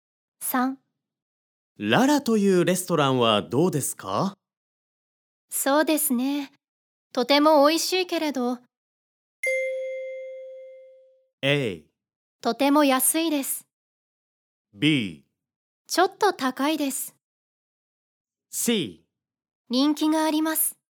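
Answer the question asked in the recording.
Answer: B: ちょっと高いです。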